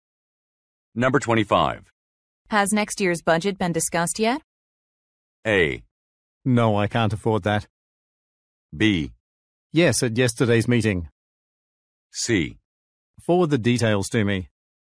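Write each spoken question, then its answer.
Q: Has next year's budget been discussed yet?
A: B: Yes, at yesterday's meeting.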